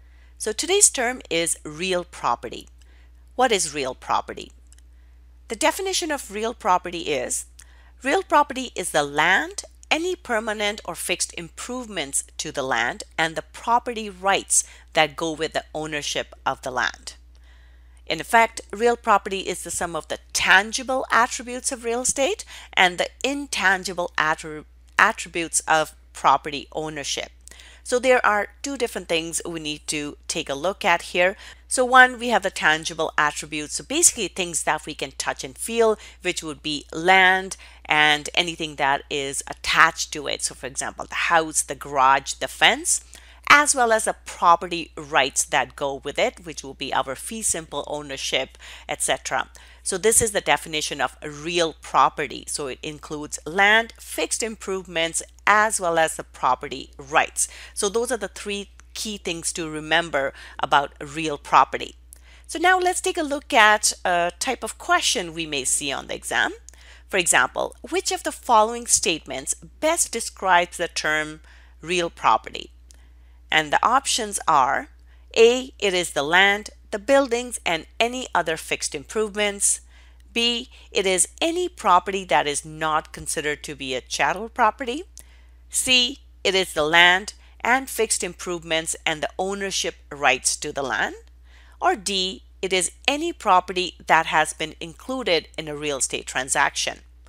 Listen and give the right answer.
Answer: So the correct answer here is C.